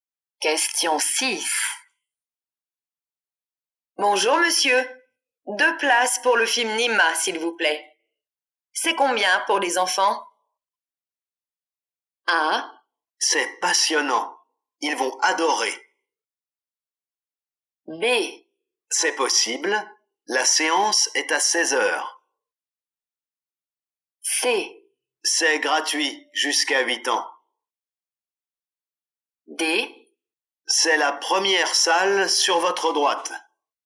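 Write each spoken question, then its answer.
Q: C'est combien pour les enfants?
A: C: C'est gratuit jusqu'à 8 ans.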